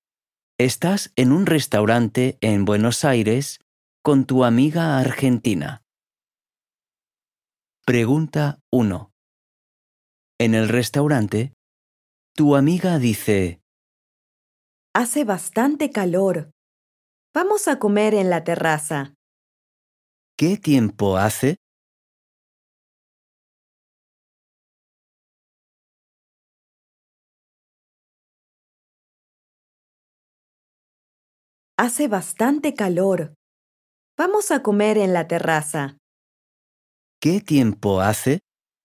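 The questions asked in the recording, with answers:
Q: ¿Qué tiempo hace?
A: Hace bastante calor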